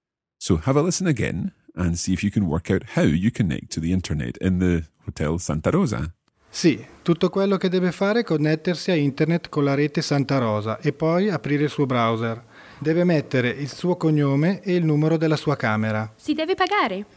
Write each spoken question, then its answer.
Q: So have a listen again and see if you can work out how you connect to the internet in the Hotel Santa Rosa.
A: tutto quello che deve fare, everything that you must do, è connettersi a internet con la rete Santa Rosa, with the Santa Rosa network.